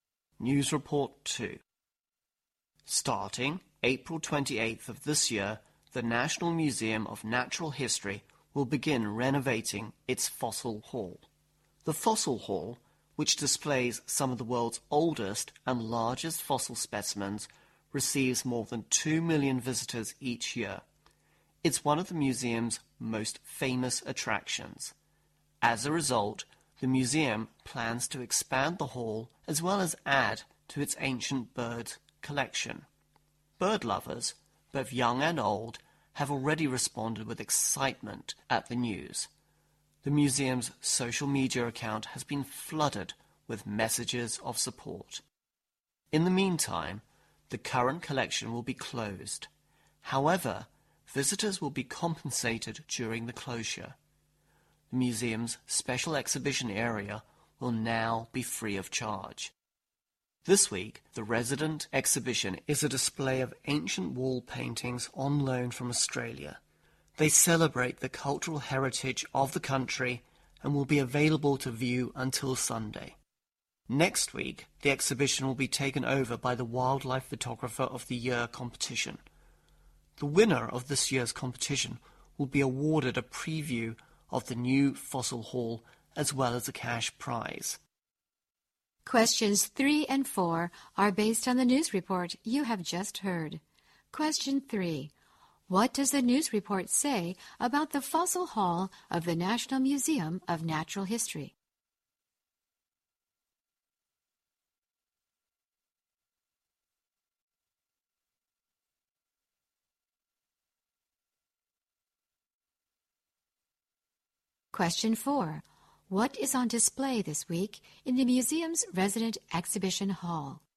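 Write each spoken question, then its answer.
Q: What is on display this week in the museum's resident exhibition hall?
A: Ancient wall paintings on loan from Australia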